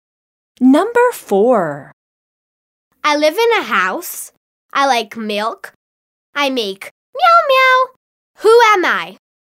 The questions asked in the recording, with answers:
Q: Who am I?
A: I am the cat.